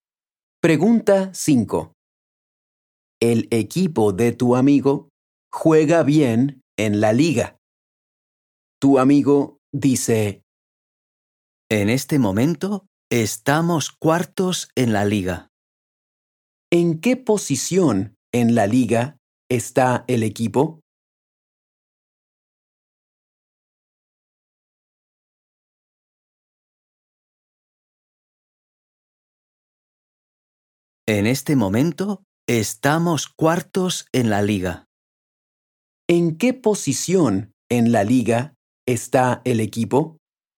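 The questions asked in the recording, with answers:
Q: ¿En qué posición en la liga está el equipo?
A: Cuarto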